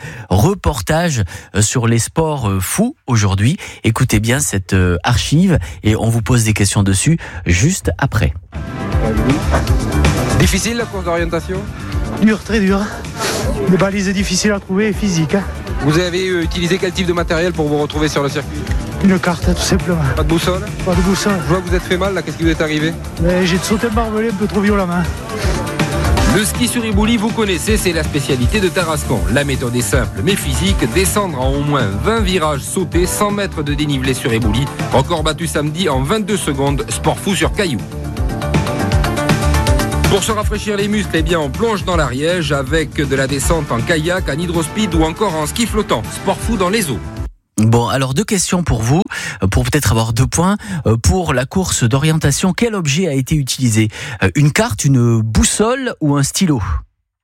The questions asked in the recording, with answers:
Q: Pour la course d'orientation, quel objet a été utilisé? Une carte, une boussole ou un stylo?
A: Et non, c'est une carte. Il n'y a pas de boussole qui a été utilisée.